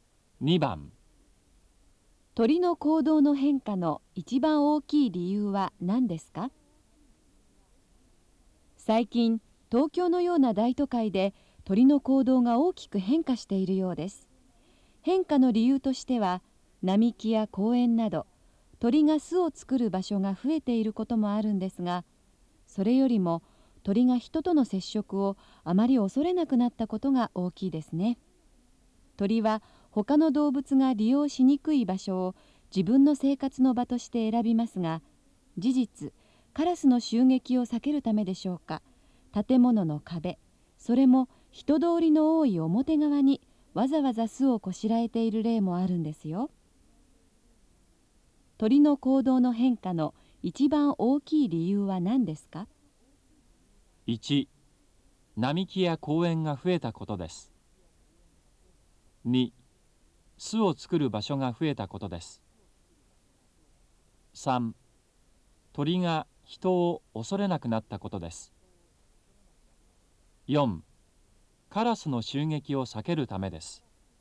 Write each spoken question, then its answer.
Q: 鳥の行動の変化の一番大きい理由は何ですか?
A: 2番、3